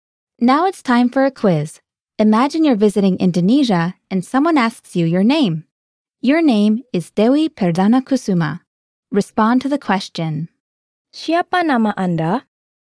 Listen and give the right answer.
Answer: Nama saya adalah Dewi Perdana Kusuma.